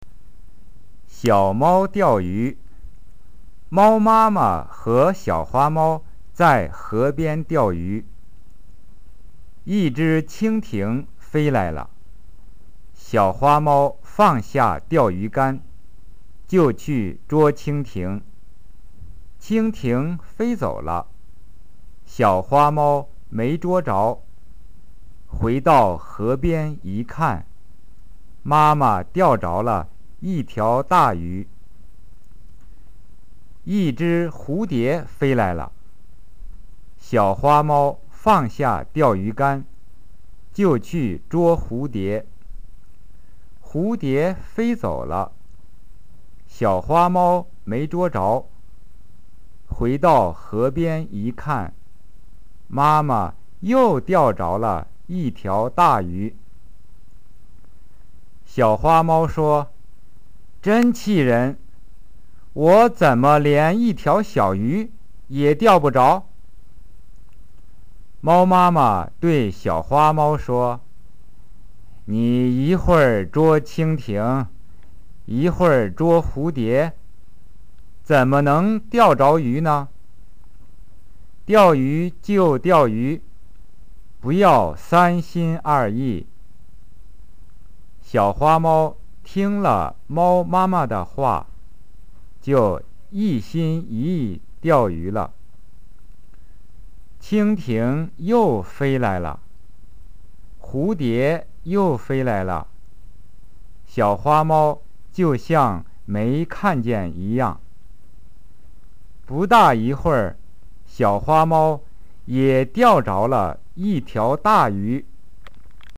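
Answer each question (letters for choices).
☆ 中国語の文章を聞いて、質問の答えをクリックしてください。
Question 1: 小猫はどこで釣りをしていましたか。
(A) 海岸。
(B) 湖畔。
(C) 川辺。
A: C

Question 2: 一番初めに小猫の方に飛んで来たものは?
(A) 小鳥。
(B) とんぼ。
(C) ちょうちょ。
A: B

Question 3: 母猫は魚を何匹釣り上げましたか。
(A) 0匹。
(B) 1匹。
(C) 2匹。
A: C

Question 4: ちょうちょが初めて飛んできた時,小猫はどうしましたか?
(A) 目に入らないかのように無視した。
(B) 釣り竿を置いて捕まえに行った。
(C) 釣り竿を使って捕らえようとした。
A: B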